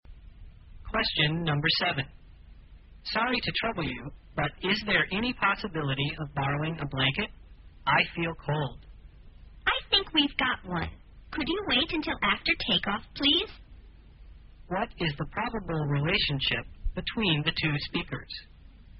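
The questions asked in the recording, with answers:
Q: What is the probable relationship between the two speakers?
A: Passenger and flight attendant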